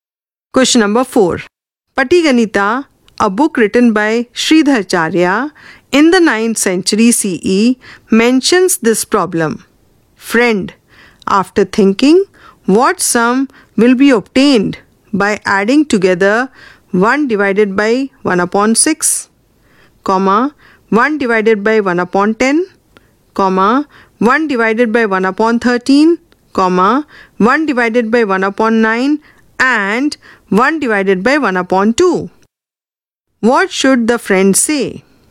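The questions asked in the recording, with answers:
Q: What should the friend say?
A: 40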